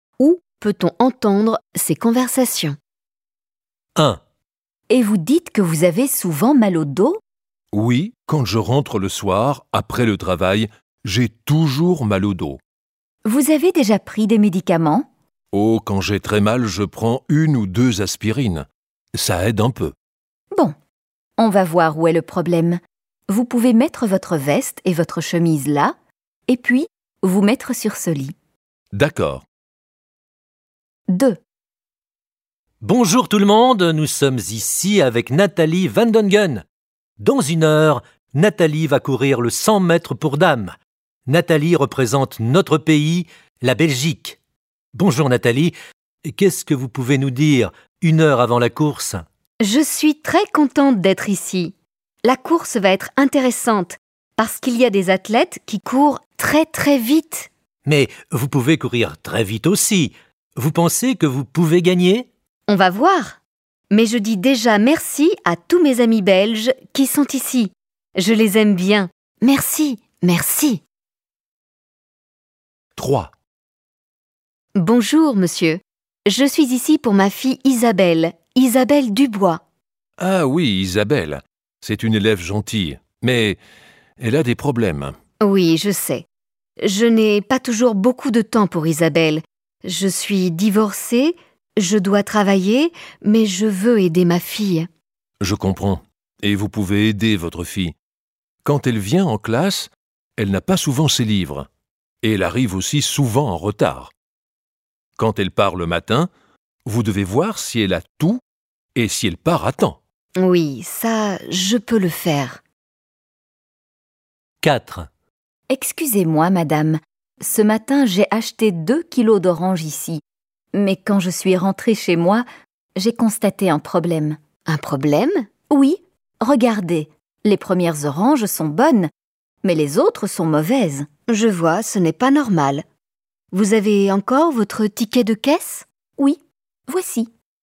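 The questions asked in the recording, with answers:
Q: Où peut-on entendre ces conversations?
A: Chez le médecin

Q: Où peut-on entendre ces conversations?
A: À une compétition d'athlétisme (interview avant une course)

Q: Où peut-on entendre ces conversations?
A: À l'école

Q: Où peut-on entendre ces conversations?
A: Au magasin / au marché (chez le marchand de fruits)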